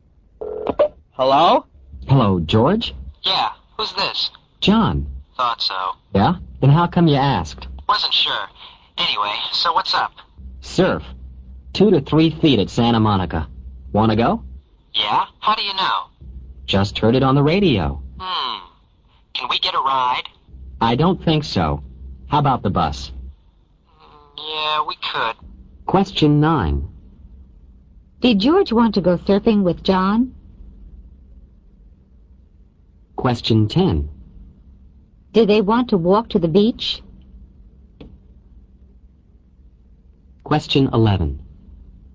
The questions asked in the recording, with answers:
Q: Did George want to go surfing with John?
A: A. Yes, he did.

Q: Did they want to walk to the beach?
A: B. No, they didn't.